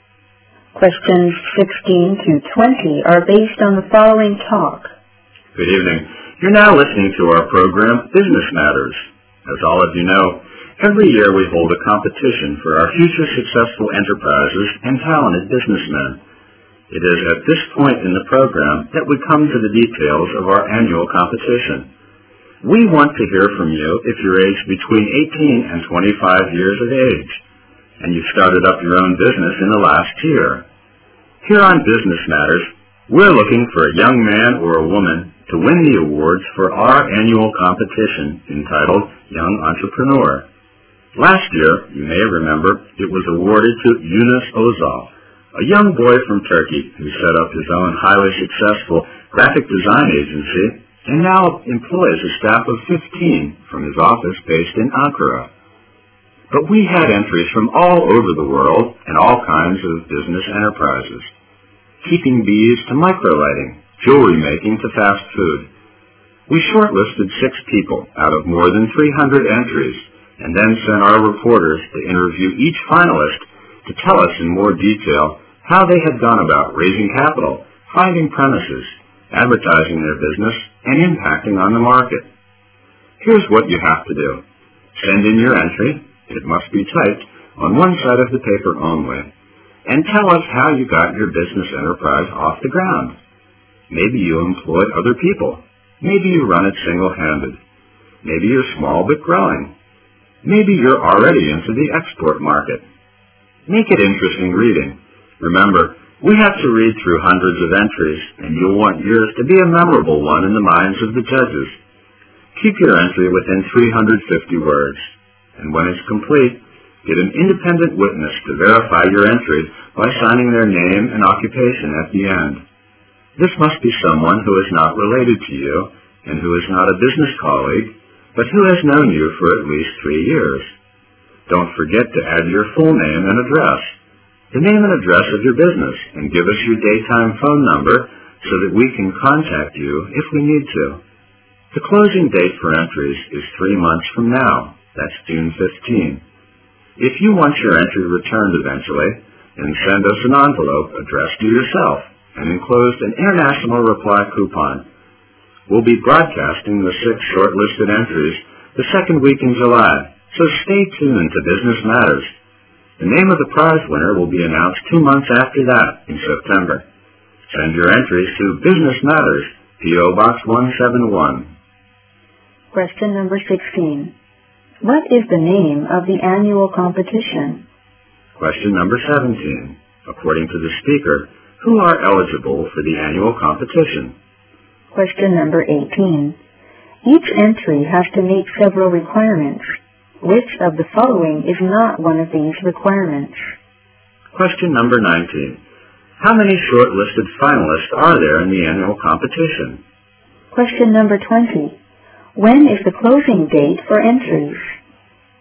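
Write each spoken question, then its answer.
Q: What is the name of the annual competition?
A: Young Entrepreneur

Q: According to the speaker, who are eligible for the annual competition?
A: People aged 18 to 25 who started their own business in the last year

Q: When is the closing date for entries?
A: June 15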